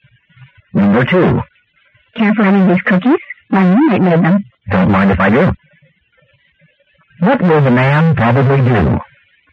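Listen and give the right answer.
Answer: Have some cookies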